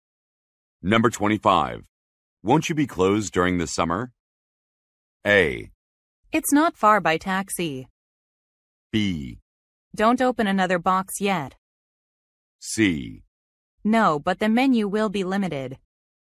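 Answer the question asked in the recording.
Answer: C: No, but the menu will be limited.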